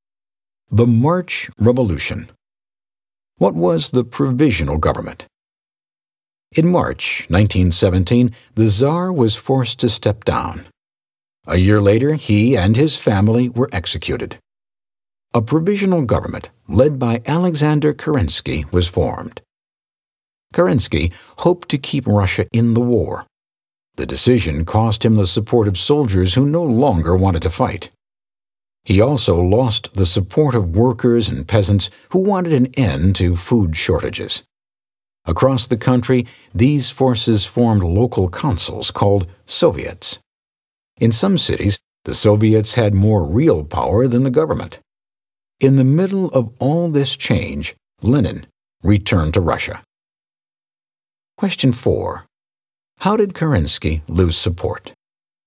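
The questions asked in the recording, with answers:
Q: How did Kerensky lose support?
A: He kept Russia in the war and did not end food shortages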